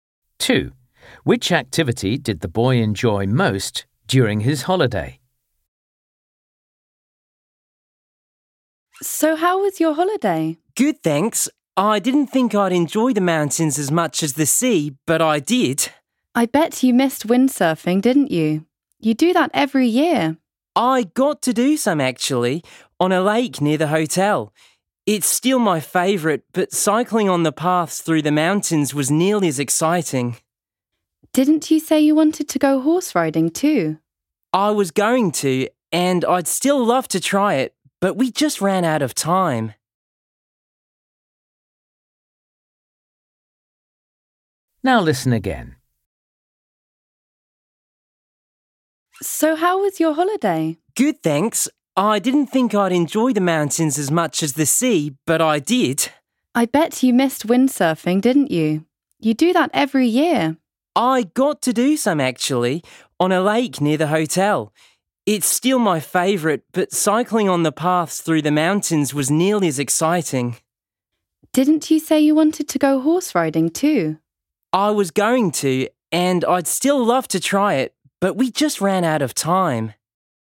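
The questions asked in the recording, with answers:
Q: Which activity did the boy enjoy most during his holiday?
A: windsurfing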